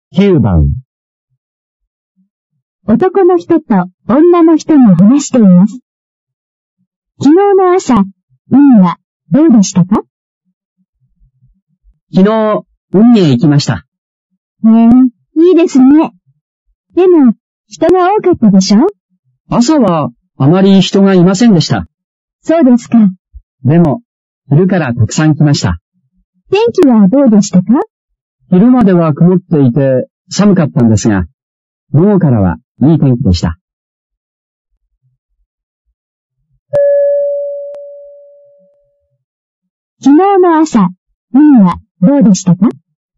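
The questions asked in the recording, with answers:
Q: 昨日の朝、海はどうでしたか?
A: 人があまりいなくて、曇っていて寒かった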